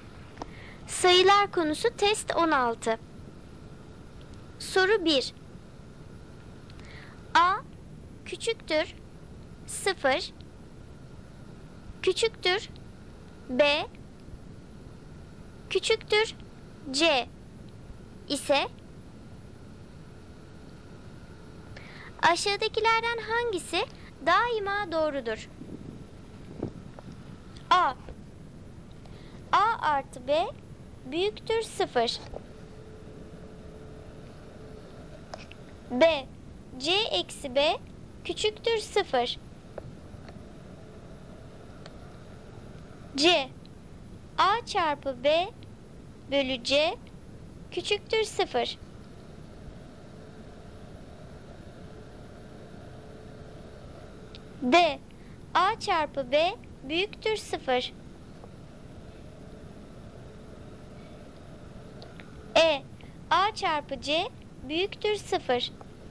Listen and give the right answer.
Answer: Doğru cevap C seçeneği, A çarpı B bölü C küçüktür 0.